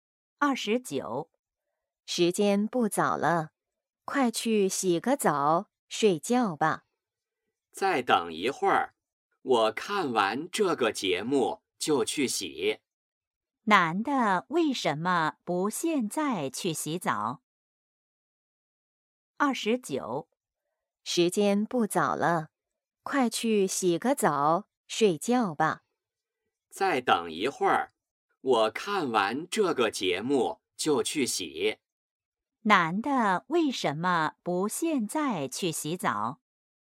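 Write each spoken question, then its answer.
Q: 男的为什么不现在去洗澡?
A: 想看完节目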